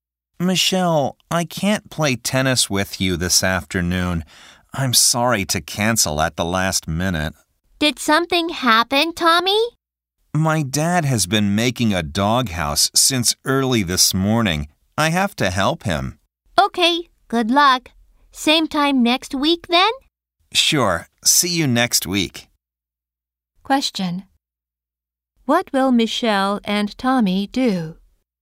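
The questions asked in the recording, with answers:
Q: What will Michelle and Tommy do?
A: Play tennis next week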